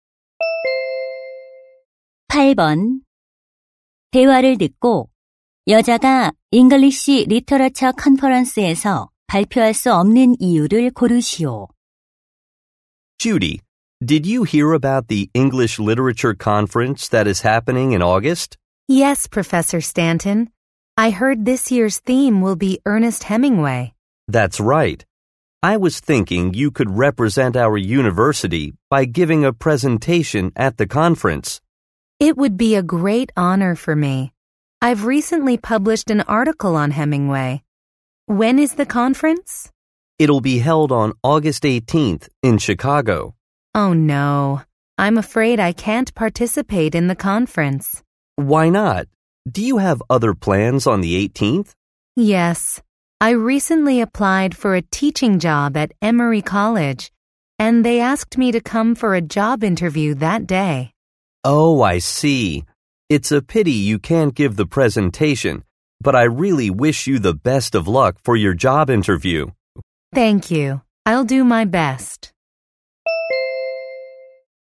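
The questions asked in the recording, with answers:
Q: 대화를 듣고 여자가 English Literature Conference에서 발표할 수 없는 이유를 고르시오.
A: 같은 날 취업 면접이 있어서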